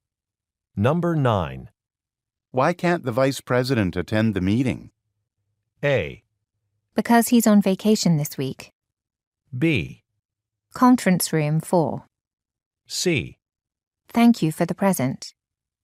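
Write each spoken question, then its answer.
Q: Why can't the vice president attend the meeting?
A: A: Because he's on vacation this week.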